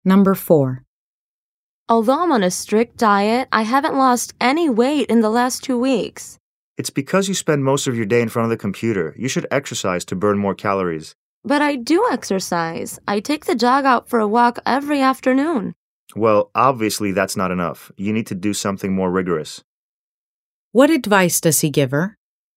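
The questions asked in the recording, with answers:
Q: What advice does he give her?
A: To do more rigorous exercise to burn more calories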